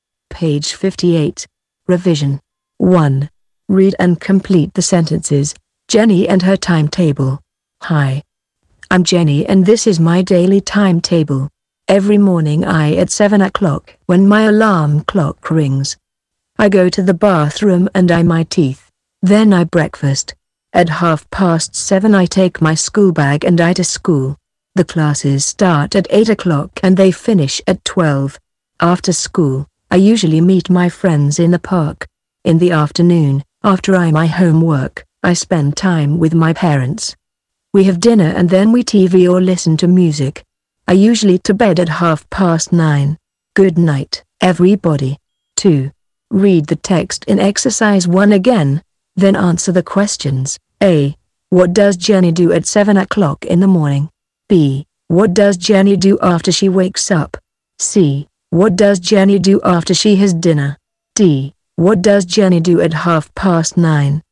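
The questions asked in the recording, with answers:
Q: What does Jenny do at 9:30?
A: She goes to bed.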